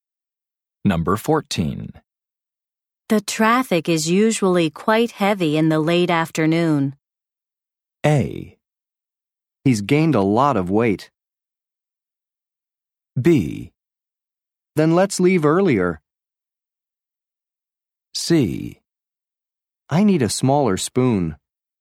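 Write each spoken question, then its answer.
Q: The traffic is usually quite heavy in the late afternoon.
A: B: Then let's leave earlier.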